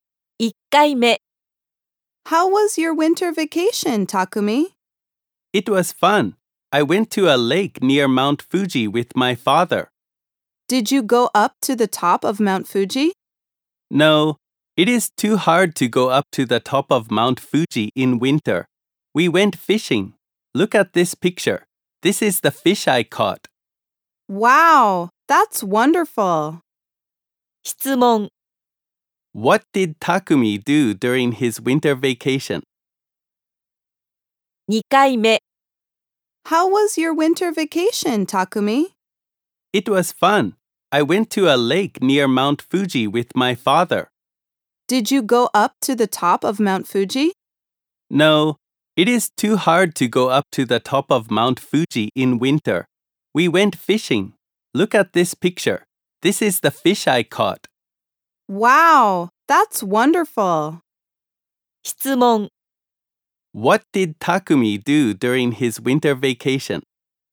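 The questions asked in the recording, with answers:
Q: What did Takumi do during his winter vacation?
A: He went fishing at a lake near Mount Fuji with his father.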